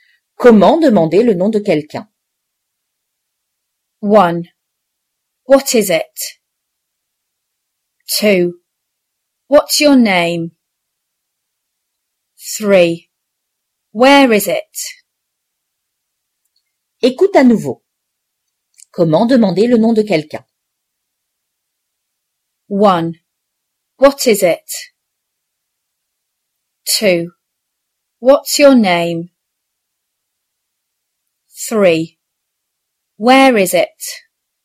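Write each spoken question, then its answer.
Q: Comment demander le nom de quelqu'un?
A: 2: What's your name?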